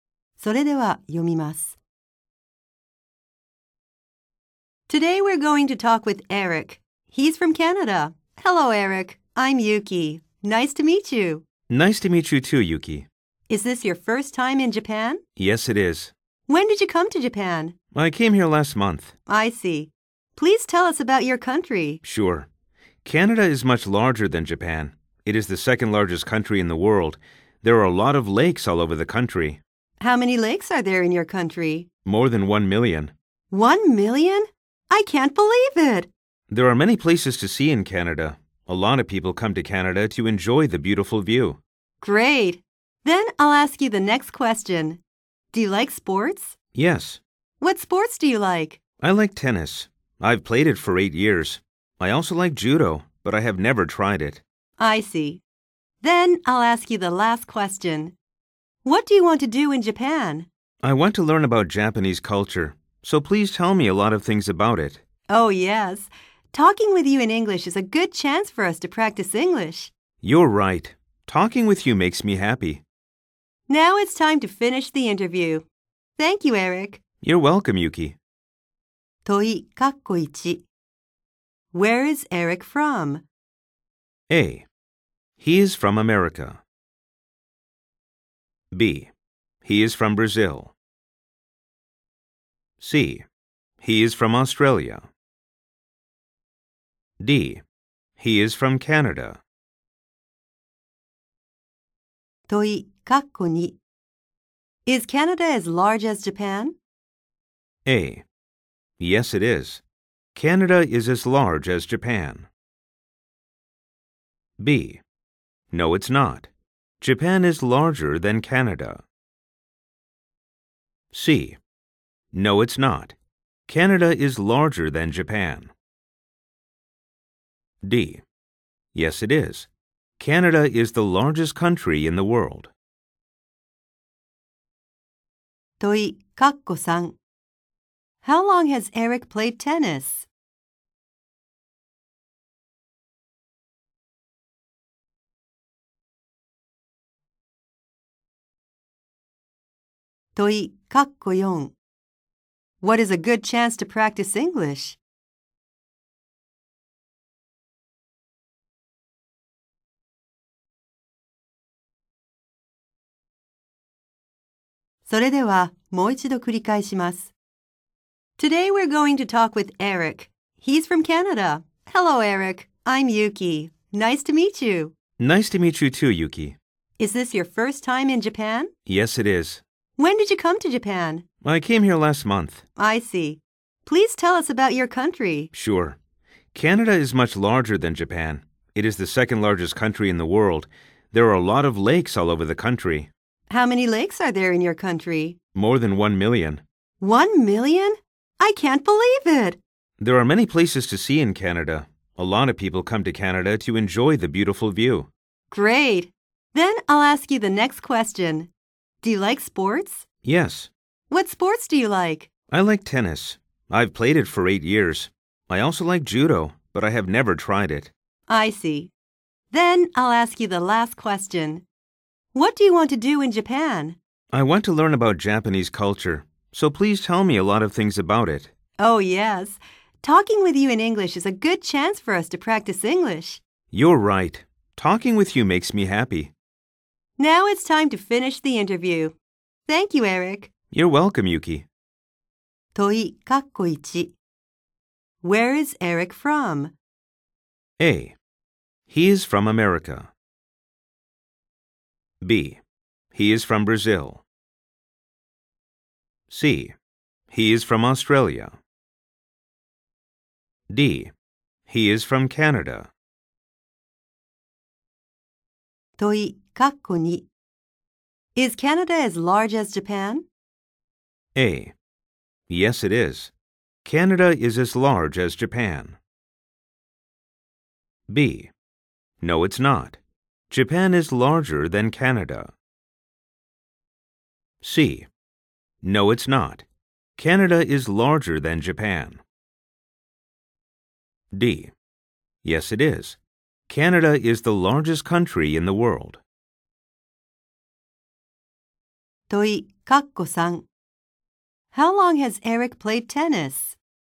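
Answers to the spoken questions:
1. D: He is from Canada.
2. C: No, it's not. Canada is larger than Japan.
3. For 8 years.
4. Talking with Eric in English.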